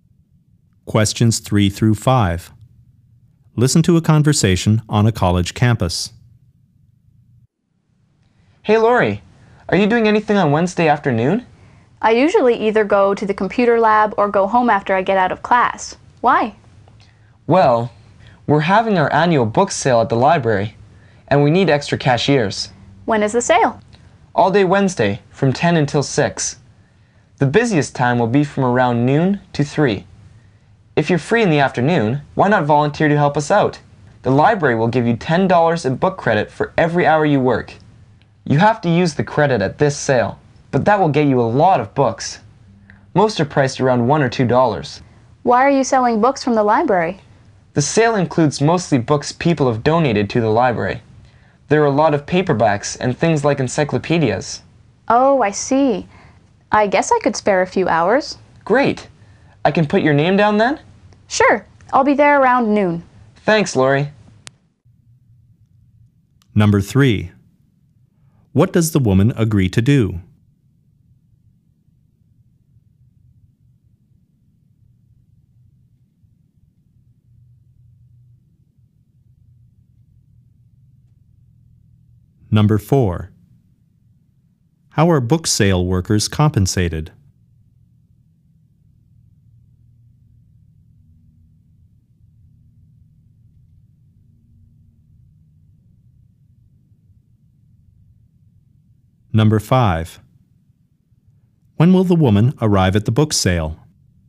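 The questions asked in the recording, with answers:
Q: What does the woman agree to do?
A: Volunteer as a cashier at the library book sale

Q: How are book sale workers compensated?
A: $10 in book credit per hour

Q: When will the woman arrive at the book sale?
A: Around noon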